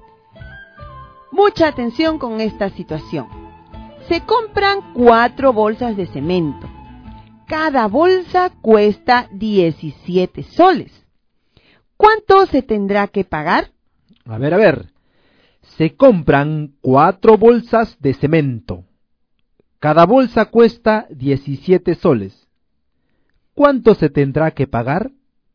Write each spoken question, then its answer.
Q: ¿Cuánto se tendrá que pagar?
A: se tendrá que pagar 68 soles.